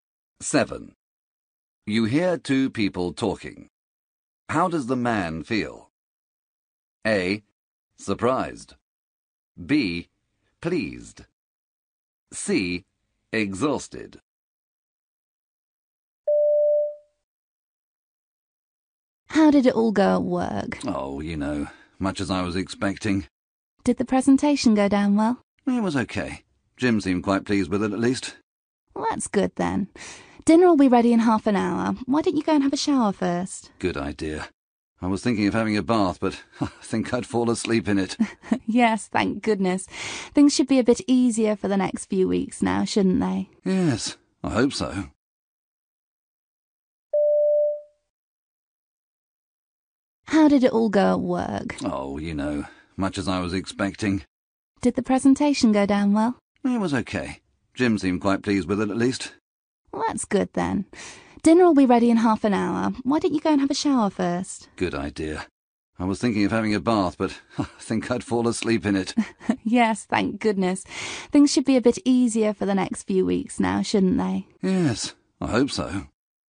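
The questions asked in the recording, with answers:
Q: How does the man feel?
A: C: Exhausted.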